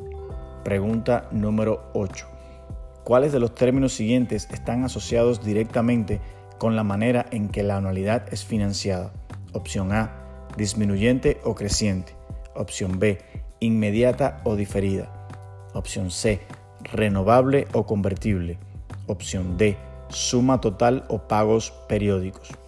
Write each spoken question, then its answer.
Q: ¿Cuáles de los términos siguientes están asociados directamente con la manera en que la anualidad es financiada?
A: Respuesta correcta. Opción D, suma total o pagos periódicos.